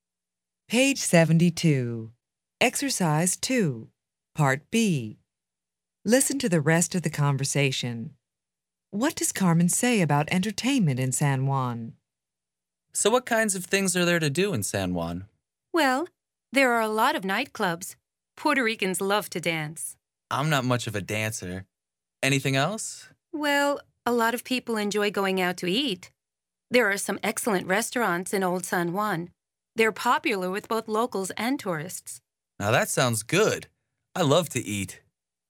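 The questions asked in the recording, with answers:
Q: What does Carmen say about entertainment in San Juan?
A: There are a lot of nightclubs and some excellent restaurants in Old San Juan.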